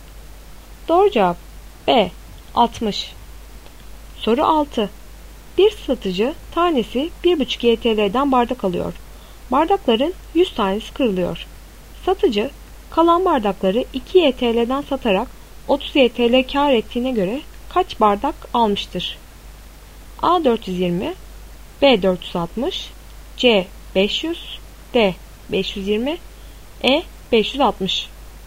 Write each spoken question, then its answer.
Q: Satıcı kalan bardakları 2 YTL'den satarak 30 YTL kar ettiğine göre kaç bardak almıştır?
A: Doğru cevap B 460.